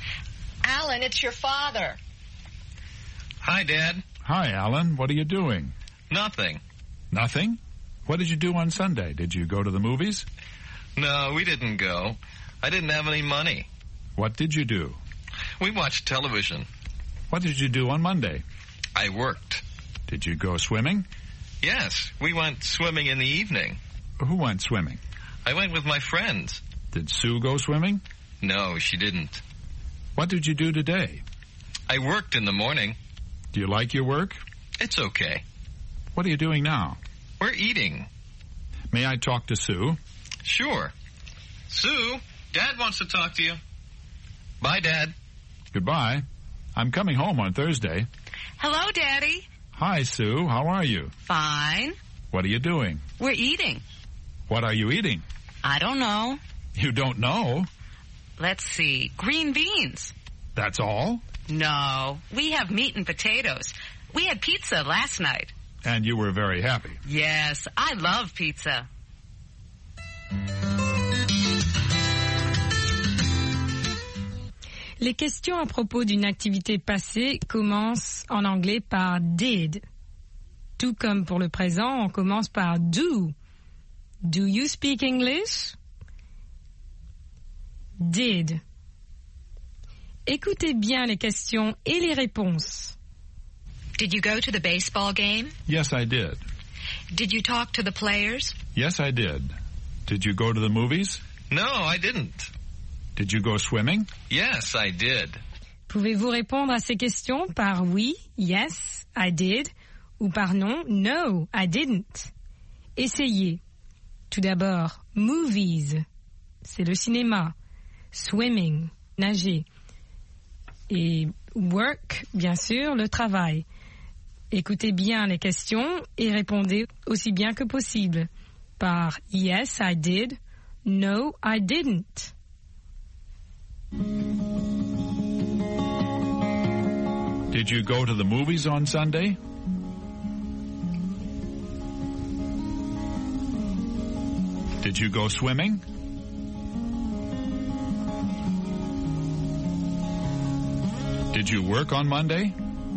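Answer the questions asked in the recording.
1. No, I didn't.
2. Yes, I did.
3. Yes, I did.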